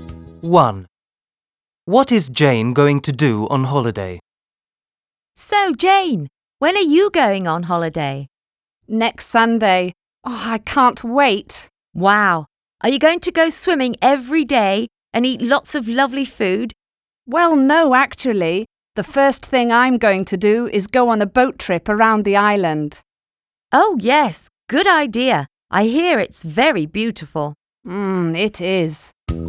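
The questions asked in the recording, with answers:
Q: What is Jane going to do on holiday?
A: Go on a boat trip around the island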